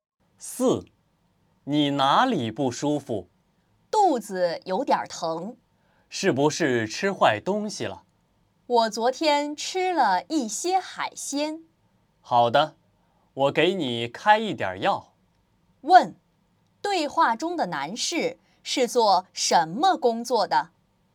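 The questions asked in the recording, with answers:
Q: 对话中的男士是做什么工作的?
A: 医生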